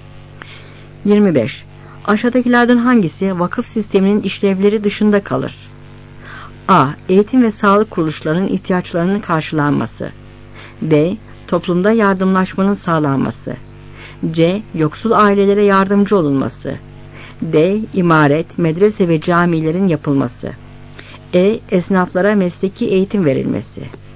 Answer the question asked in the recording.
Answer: Cevap E.